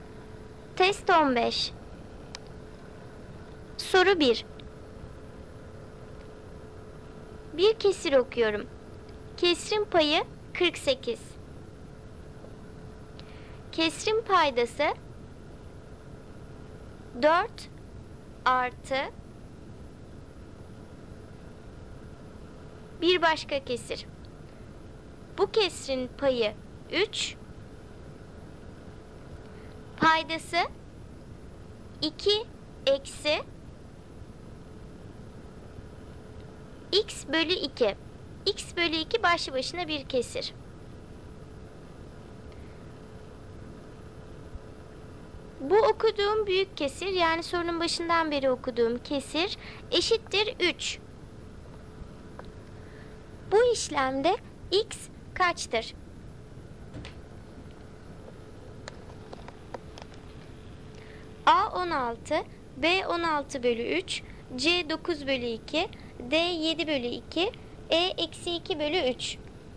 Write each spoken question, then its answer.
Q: Bu işlemde x kaçtır?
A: Doğru cevap D 7 bölü 2.